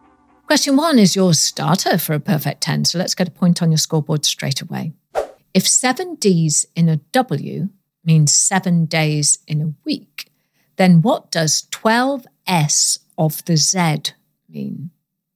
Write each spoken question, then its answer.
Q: If seven D's in a W means 7 days in a week, then what does 12 S of the Z mean?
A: And the answer is 12 signs of the zodiac.